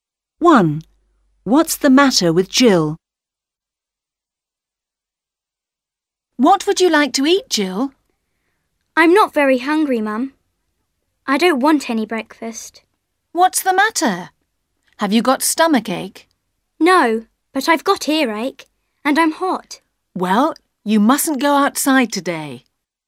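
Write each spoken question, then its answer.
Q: What's the matter with Jill?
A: She has earache and is hot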